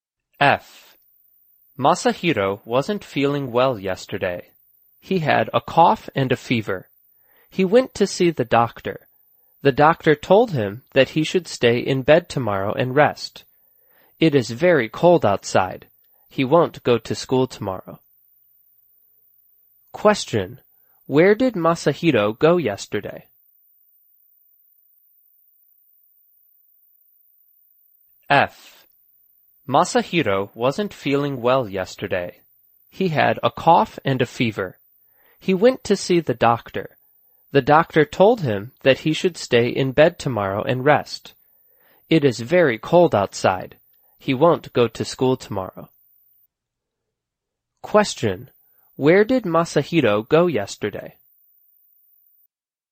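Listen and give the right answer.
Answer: To see the doctor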